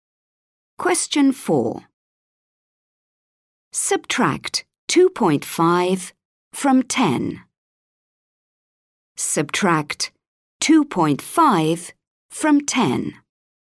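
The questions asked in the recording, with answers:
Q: Subtract 2.5 from 10.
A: 7.5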